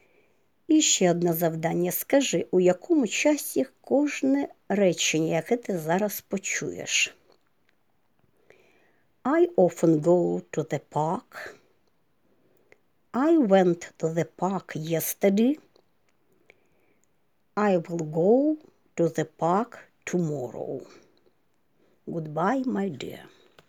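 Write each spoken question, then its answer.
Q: Скажи, у якому часі кожне речення, яке ти зараз почуєш?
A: Теперішній простий (Present Simple), минулий простий (Past Simple), майбутній простий (Future Simple)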